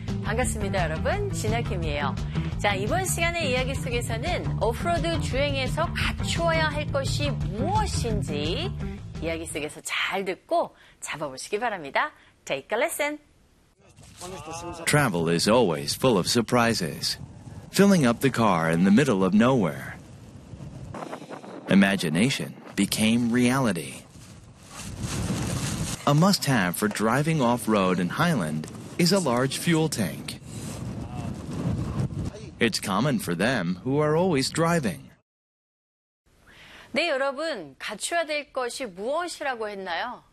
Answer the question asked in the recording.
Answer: 맞아요. 큰 연료 탱크라고 합니다.